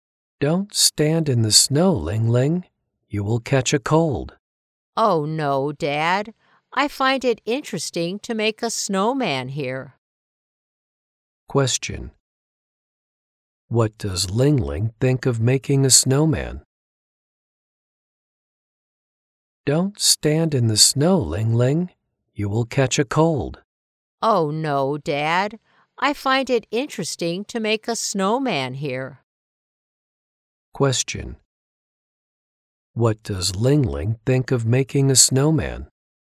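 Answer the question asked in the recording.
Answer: Interesting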